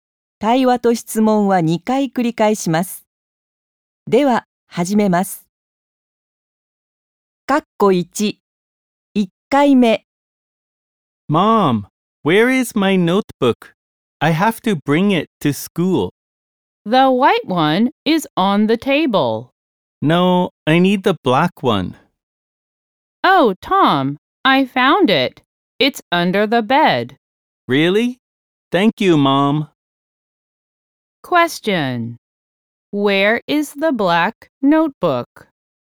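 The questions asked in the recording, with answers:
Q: Where is the black notebook?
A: Under the bed.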